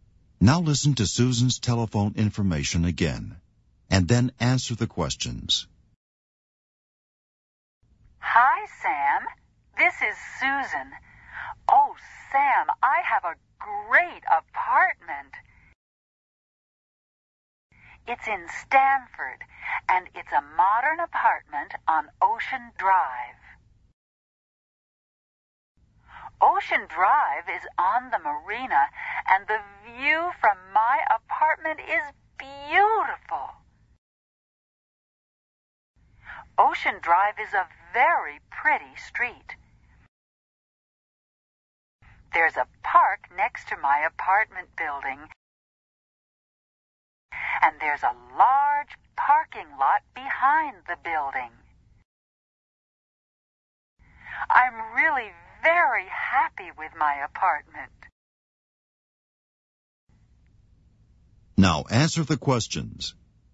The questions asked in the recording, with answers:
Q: Is there a park next to Susan's apartment building?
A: Yes, there is.